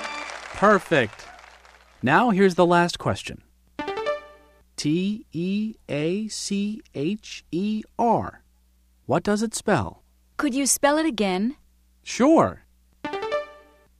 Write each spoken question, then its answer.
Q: T-E-A-C-H-E-R. What does it spell?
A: T-E-A-C-H-E-R spells teacher.